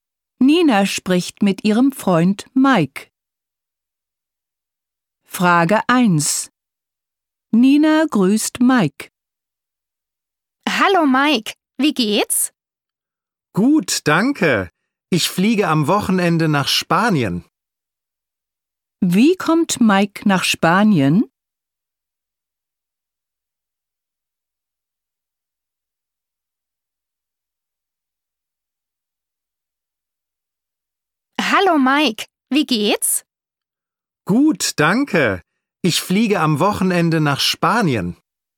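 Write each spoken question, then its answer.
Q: Wie kommt Mike nach Spanien?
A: Mit dem Flugzeug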